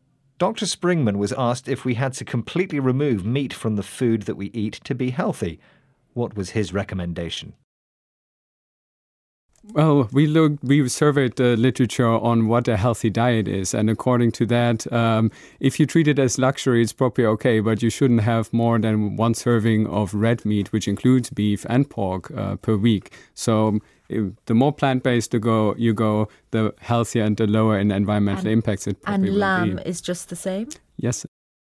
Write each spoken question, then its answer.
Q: What was his recommendation?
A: you could still have some red meat, but only once a week.